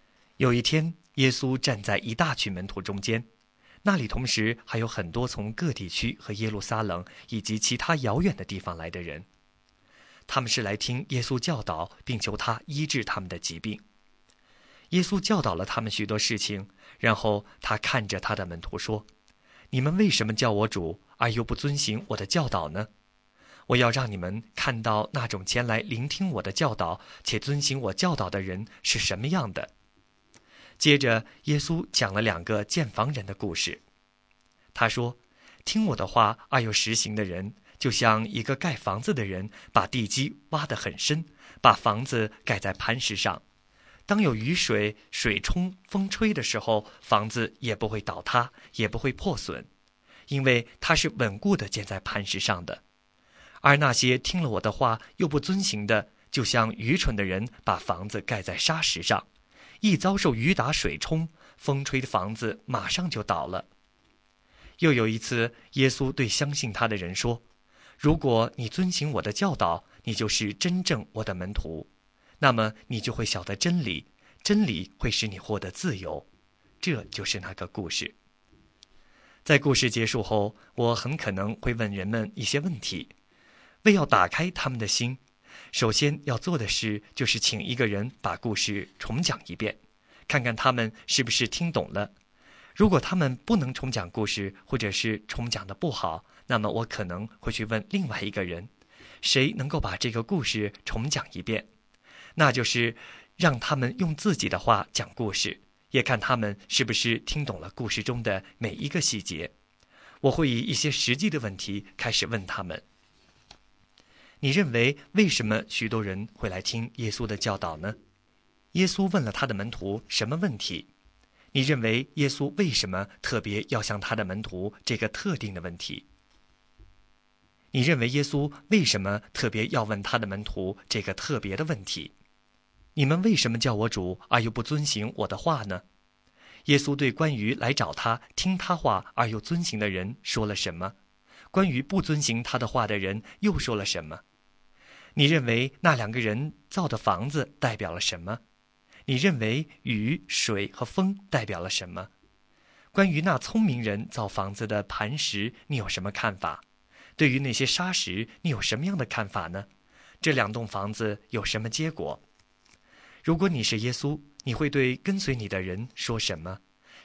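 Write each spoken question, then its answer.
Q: 耶稣问了他的门徒什么问题?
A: 你们为什么叫我主而又不遵行我的教导呢?

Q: 这两栋房子有什么结果?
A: 盖在磐石上的房子不倒塌也不破损;盖在沙石上的房子马上就倒了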